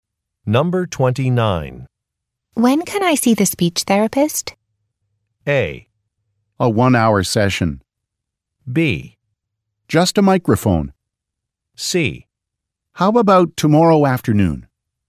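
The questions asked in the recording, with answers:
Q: When can I see the speech therapist?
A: C: How about tomorrow afternoon?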